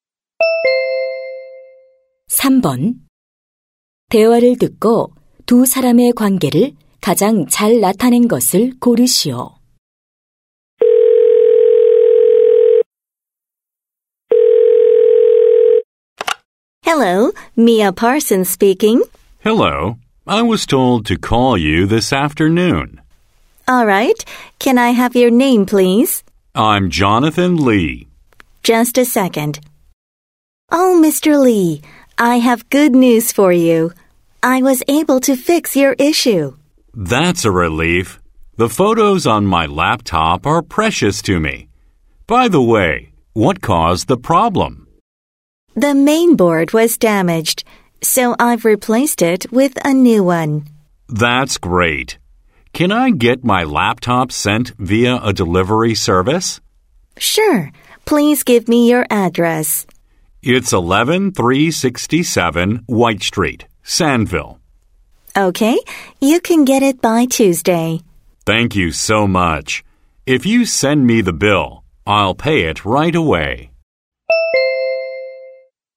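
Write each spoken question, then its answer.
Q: 대화를 듣고 두 사람의 관계를 가장 잘 나타낸 것을 고르시오.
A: 노트북 수리 기사 - 고객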